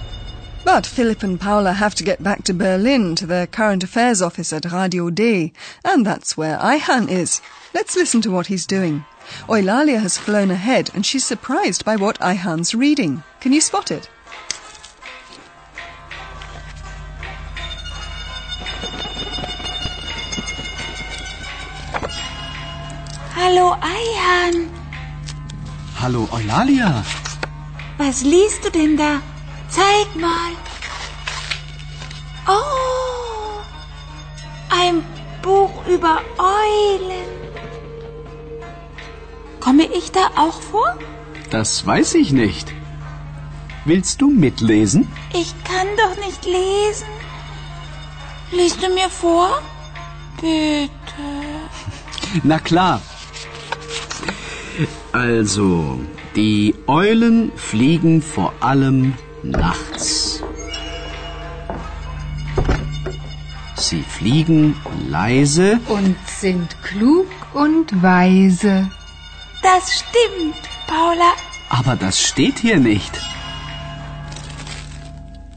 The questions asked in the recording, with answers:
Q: Can you spot it?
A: Oh, ein Buch über Eulen.